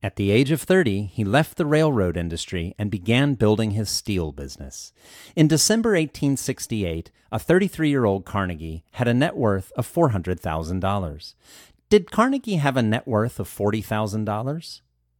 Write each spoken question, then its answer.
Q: Did Carnegie have a net worth of $40,000?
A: No, he didn't have a net worth of $40,000.